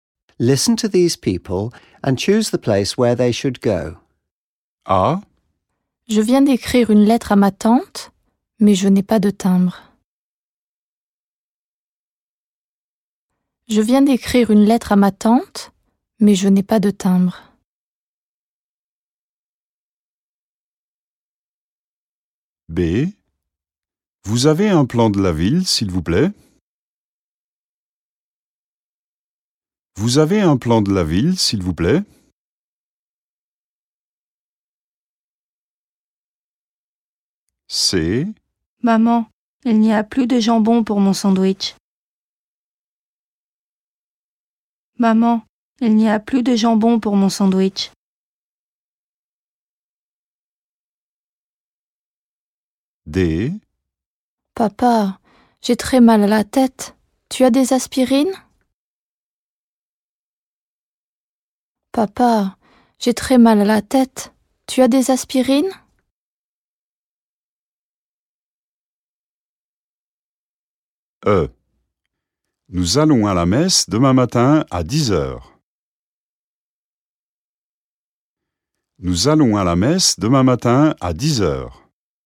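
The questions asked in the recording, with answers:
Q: Listen to these people and choose the place where they should go.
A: post office

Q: Listen to these people and choose the place where they should go.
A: tourist office

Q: Listen to these people and choose the place where they should go.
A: pharmacy

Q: Listen to these people and choose the place where they should go.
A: church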